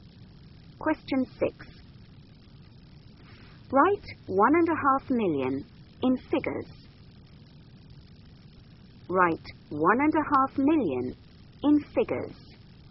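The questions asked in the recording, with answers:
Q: Write 1.5 million in figures.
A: 1500000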